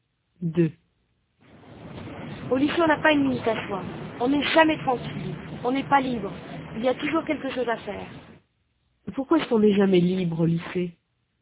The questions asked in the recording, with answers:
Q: Pourquoi est-ce qu'on n'est jamais libre au lycée?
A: Parce qu'il y a toujours quelque chose à faire.